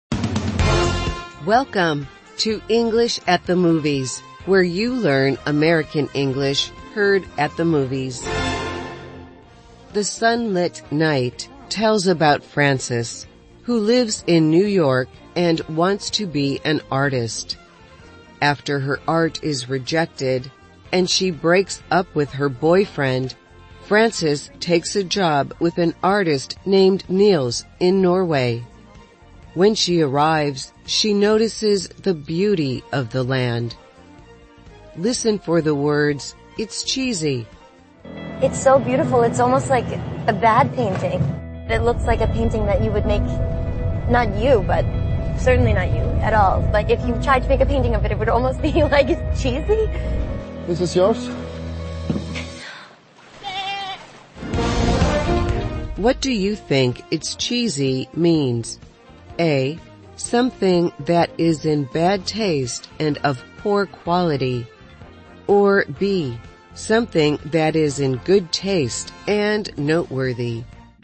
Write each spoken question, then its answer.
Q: What do you think it's cheesy means?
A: The answer is A. It's cheesy describes something that is in bad taste and of poor quality.